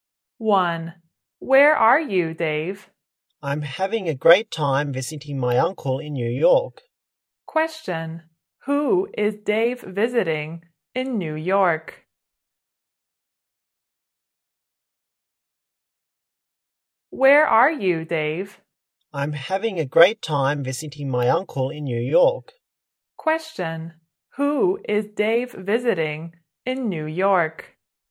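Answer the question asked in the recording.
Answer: His uncle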